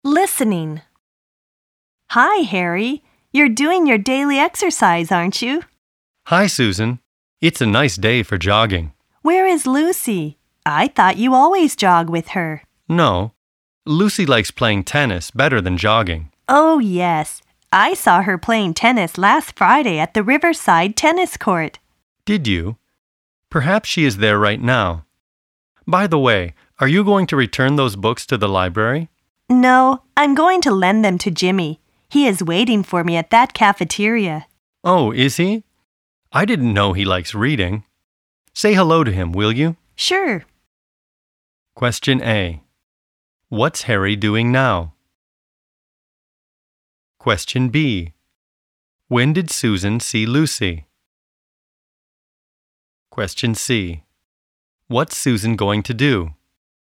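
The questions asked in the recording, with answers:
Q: What's Harry doing now?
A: He's jogging (doing his daily exercise).

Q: When did Susan see Lucy?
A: Last Friday.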